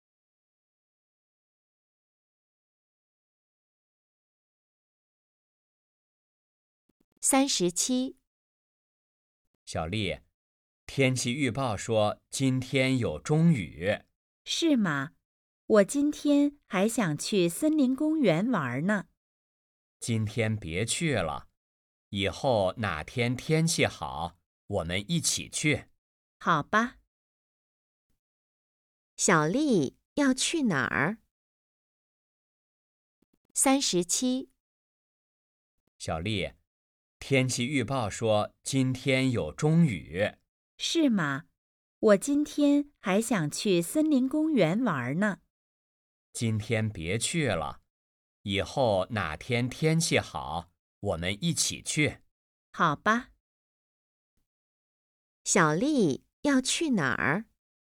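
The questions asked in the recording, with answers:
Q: 小丽要去哪儿?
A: 森林公园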